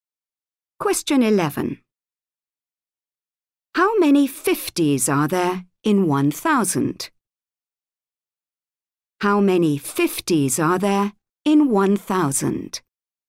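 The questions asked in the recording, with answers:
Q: How many 50s are there in 1,000?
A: 20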